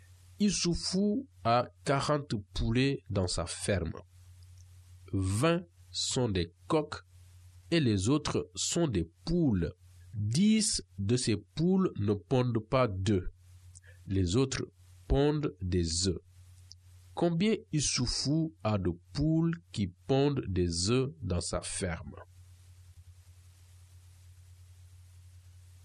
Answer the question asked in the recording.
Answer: la réponse au problème est que l'éleveur de poulets a 10 poules qui pondent.